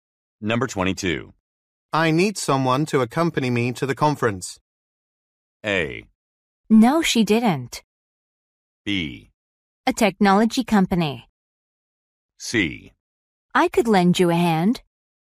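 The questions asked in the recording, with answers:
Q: I need someone to accompany me to the conference.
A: C: I could lend you a hand.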